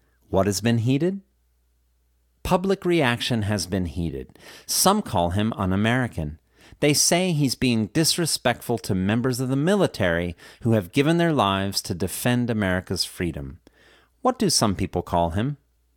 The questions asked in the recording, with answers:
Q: What do some people call him?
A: Some people call him un-American.